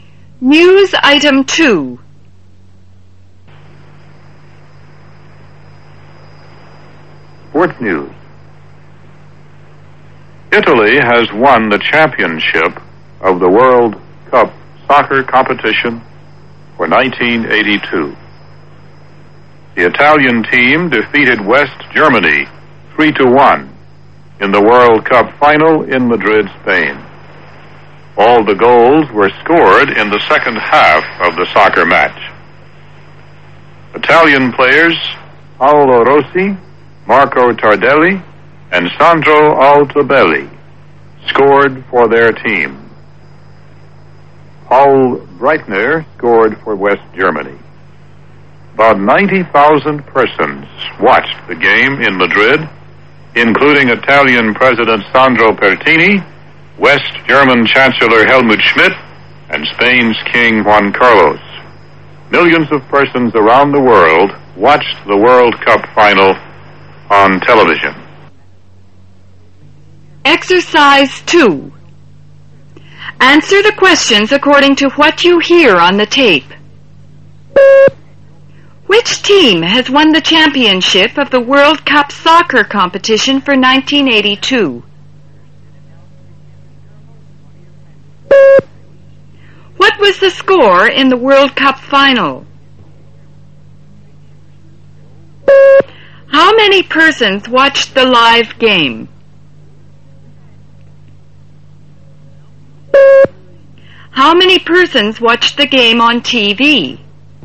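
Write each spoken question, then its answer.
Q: Which team has won the championship of the World Cup soccer competition for 1982?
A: Italy

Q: What was the score in the World Cup final?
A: 3-1

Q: How many persons watched the live game?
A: About 90,000

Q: How many persons watched the game on TV?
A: Millions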